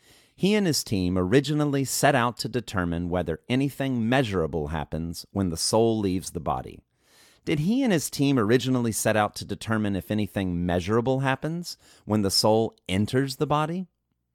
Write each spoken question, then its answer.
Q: Did he and his team originally set out to determine if anything measurable happens when the soul enters the body?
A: No, he and his team did not originally set out to determine whether anything measurable happens when the soul enters the body.